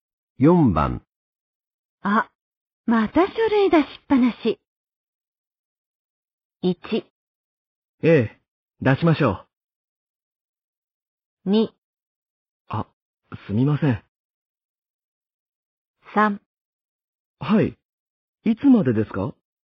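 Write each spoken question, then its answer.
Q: あ、また書類出しっぱなし。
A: 2: あ、すみません。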